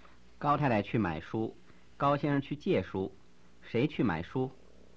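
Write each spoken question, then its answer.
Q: 谁去买书?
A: 高太太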